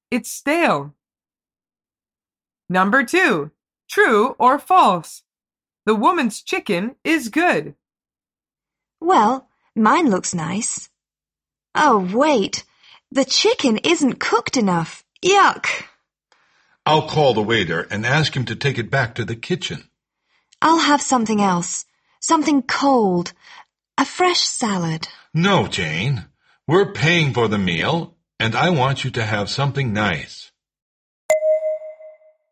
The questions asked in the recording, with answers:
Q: true or false? The woman's chicken is good.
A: The answer is false.